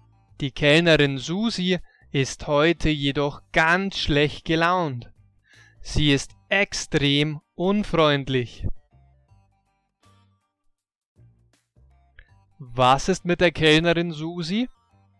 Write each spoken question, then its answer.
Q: Was ist mit der Kellnerin Susi?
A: Sie ist heute ganz schlecht gelaunt. Sie ist extrem unfreundlich.